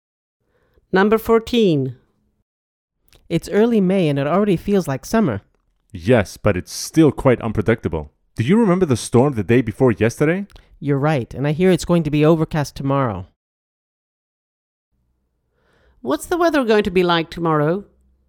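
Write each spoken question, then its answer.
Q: What's the weather going to be like tomorrow?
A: overcast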